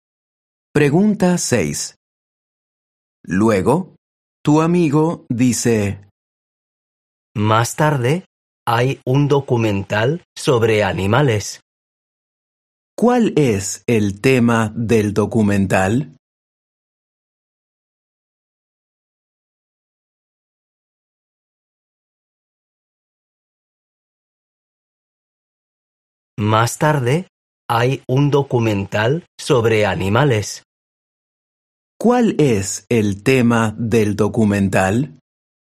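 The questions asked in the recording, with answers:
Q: ¿Cuál es el tema del documental?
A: Los animales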